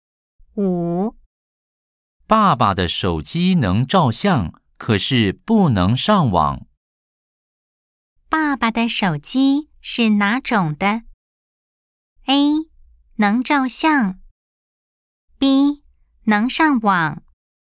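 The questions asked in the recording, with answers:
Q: 爸爸的手机是哪种的?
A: A: 能照相。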